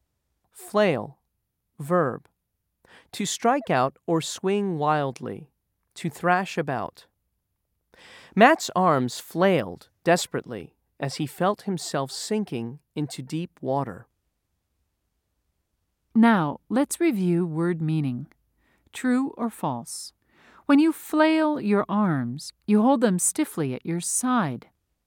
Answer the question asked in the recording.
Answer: If you said false, you're correct.